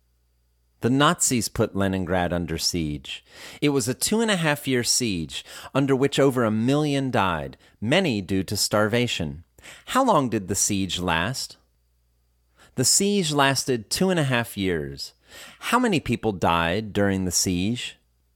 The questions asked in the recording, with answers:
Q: How many people died during the siege?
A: Over 1 million people died during the siege.